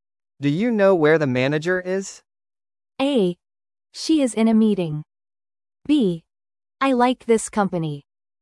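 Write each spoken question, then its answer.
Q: Do you know where the manager is?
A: A: She is in a meeting.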